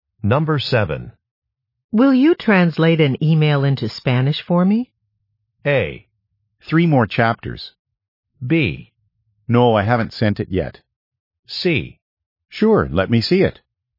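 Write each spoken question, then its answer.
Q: Will you translate an email into Spanish for me?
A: C: Sure, let me see it.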